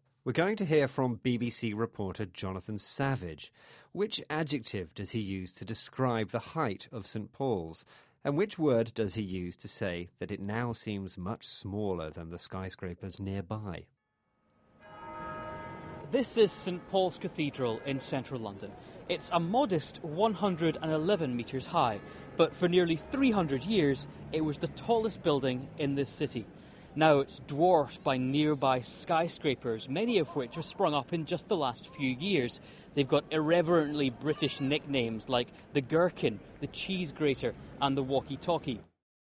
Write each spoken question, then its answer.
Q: Which adjective does he use to describe the height of St.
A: He said it was a modest 111 metres high.

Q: And which word does he use to say that it now seems much smaller than the skyscrapers nearby?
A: And the other word we asked you to listen out for was dwarfed.